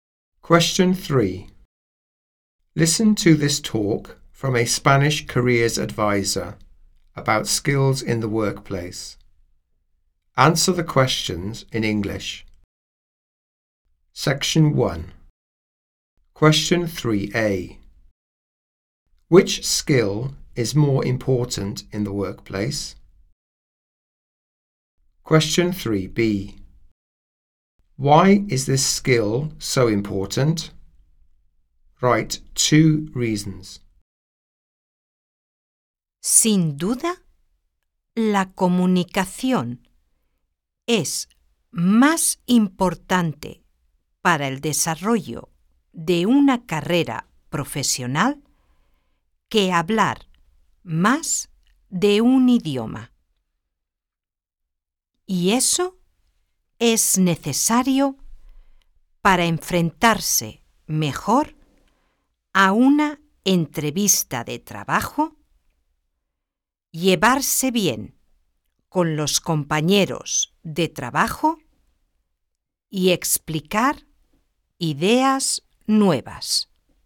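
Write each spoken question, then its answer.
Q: Which skill is more important in the workplace?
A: Communication

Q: Why is this skill so important?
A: Job interviews, getting on with colleagues, explaining new ideas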